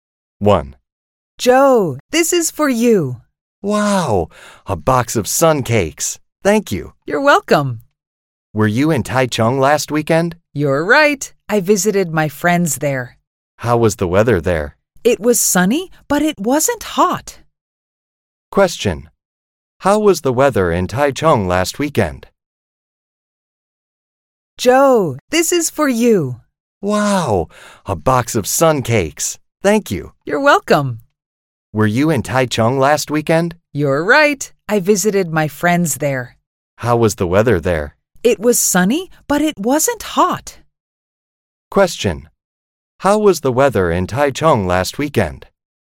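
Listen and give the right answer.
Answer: It was sunny but not hot.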